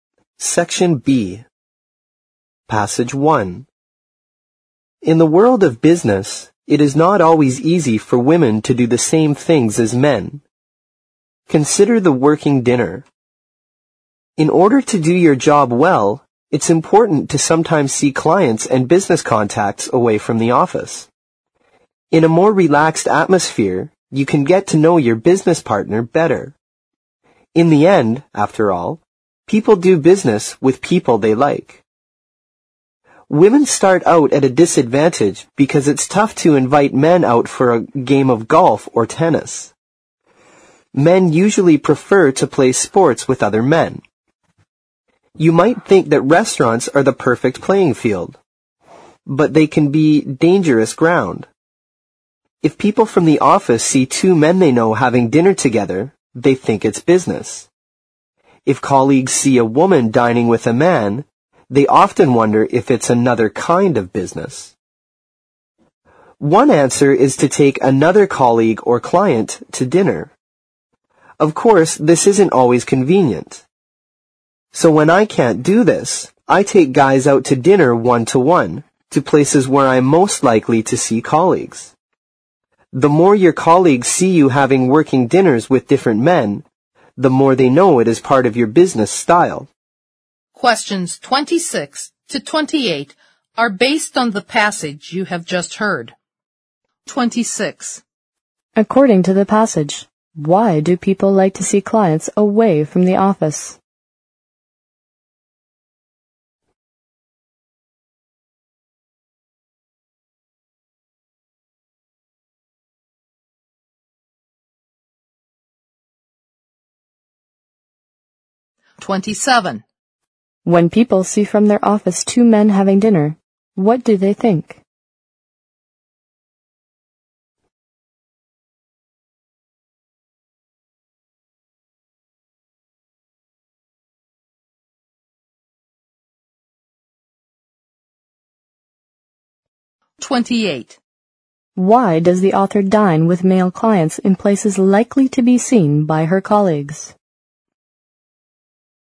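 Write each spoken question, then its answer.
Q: According to the passage, why do people like to see clients away from the office?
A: To get to know business partners better in a more relaxed atmosphere

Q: When people see from their office two men having dinner, what do they think?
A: They think it's business

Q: Why does the author dine with male clients in places likely to be seen by her colleagues?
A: So colleagues know working dinners with different men are part of her business style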